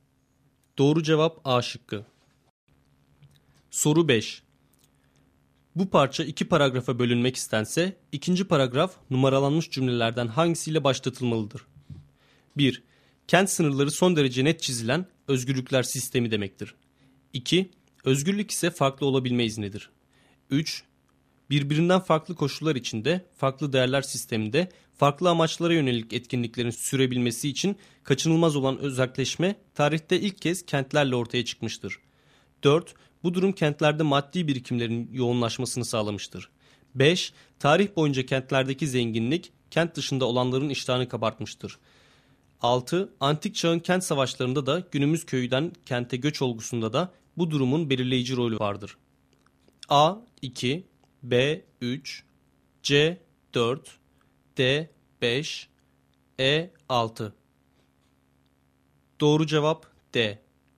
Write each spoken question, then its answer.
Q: Bu parça iki paragrafa bölünmek istense, ikinci paragraf numaralanmış cümlelerden hangisiyle başlatılmalıdır?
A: Doğru cevap D.